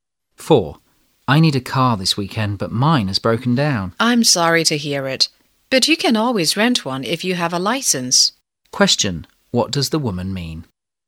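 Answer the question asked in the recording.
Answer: The man can rent a car if he has a license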